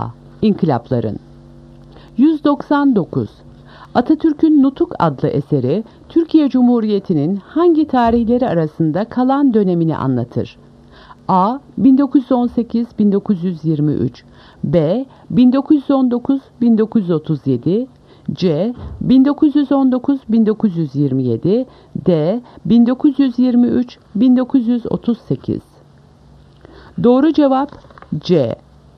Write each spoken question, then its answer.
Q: Atatürk'ün Nutuk adlı eseri Türkiye Cumhuriyeti'nin hangi tarihleri arasında kalan dönemini anlatır?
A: Doğru cevap C. 1919-1927.